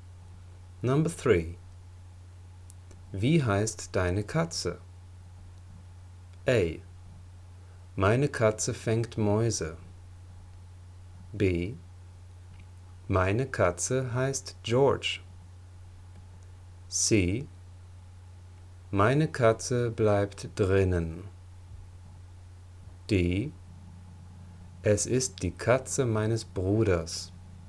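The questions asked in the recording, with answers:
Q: Wie heißt deine Katze?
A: B: Meine Katze heißt George.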